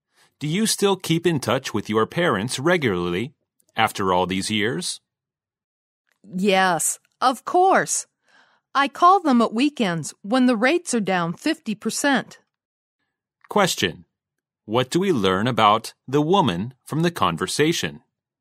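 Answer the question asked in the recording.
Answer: She keeps in touch with her parents by calling them at weekends, when the rates are 50% lower.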